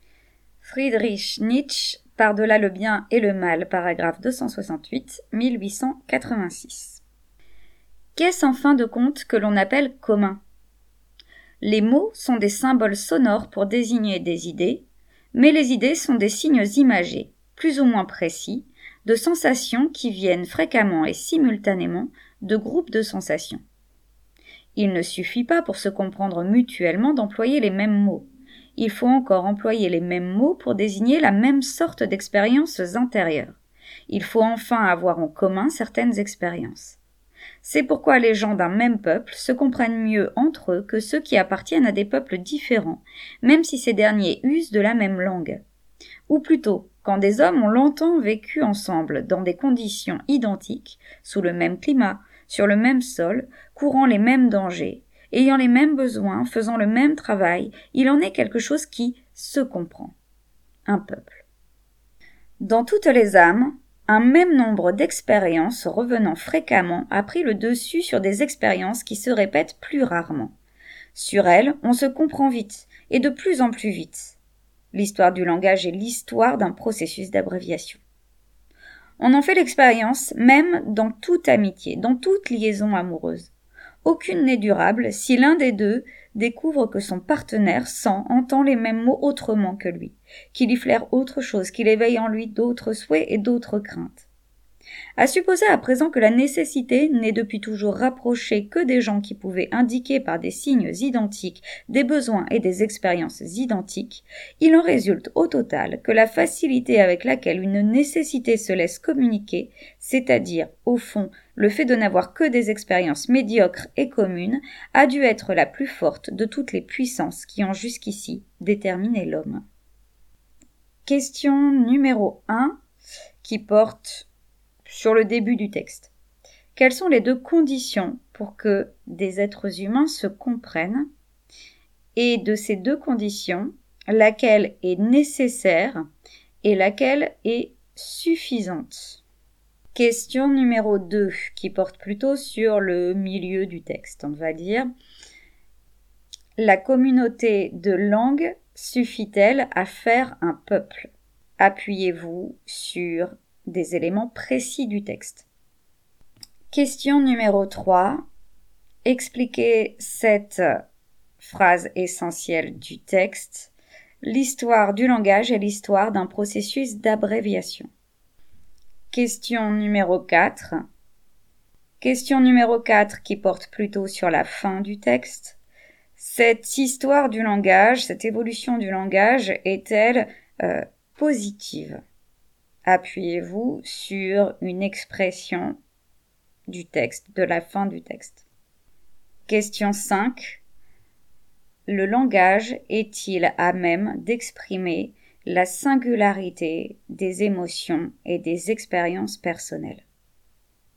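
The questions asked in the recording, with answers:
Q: La communauté de langue suffit-elle à faire un peuple ?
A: Non : des peuples différents usant de la même langue se comprennent moins bien ; il faut avoir vécu ensemble dans des conditions identiques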